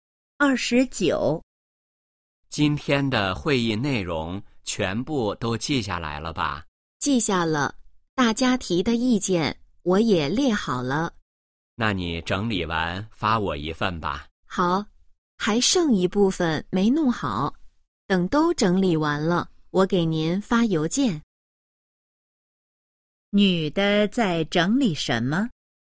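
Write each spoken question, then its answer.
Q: 女的在整理什么?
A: 会议记录(大家提的意见)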